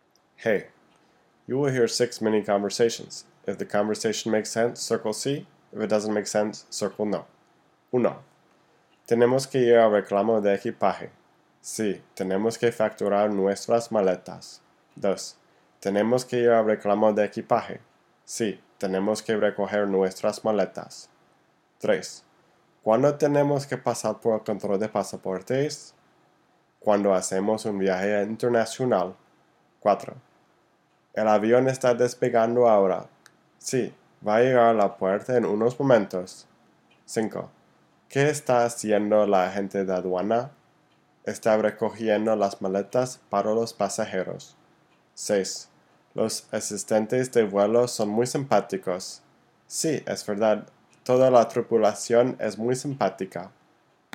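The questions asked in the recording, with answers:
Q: Tenemos que ir al reclamo de equipaje. Sí, tenemos que facturar nuestras maletas.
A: no

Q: Tenemos que ir al reclamo de equipaje. Sí, tenemos que recoger nuestras maletas.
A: sí

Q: ¿Cuándo tenemos que pasar por el control de pasaportes? Cuando hacemos un viaje internacional.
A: sí

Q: El avión está despegando ahora. Sí, va a llegar a la puerta en unos momentos.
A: no

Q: Los asistentes de vuelo son muy simpáticos. Sí, es verdad. Toda la tripulación es muy simpática.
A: sí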